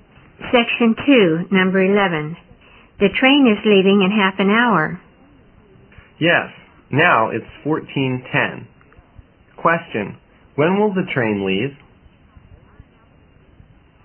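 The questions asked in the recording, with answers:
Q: when will the train leave?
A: At 14:40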